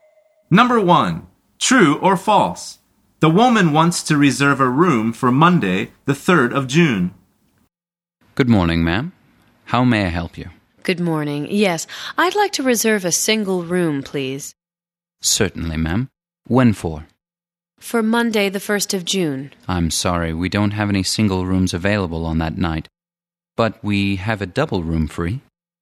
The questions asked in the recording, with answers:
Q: True or false? The woman wants to reserve a room for Monday, the 3rd of June.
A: The answer is false. She says, for Monday, the 1st of June.